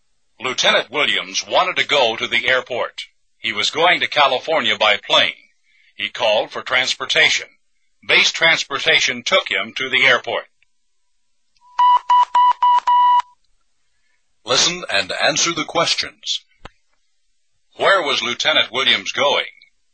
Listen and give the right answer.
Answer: To California. He was going to California.